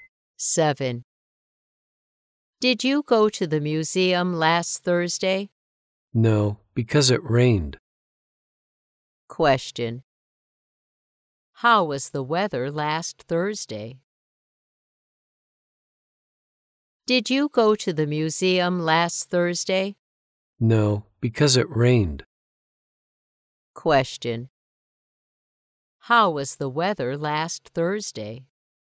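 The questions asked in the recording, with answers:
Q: How was the weather last Thursday?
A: It was rainy.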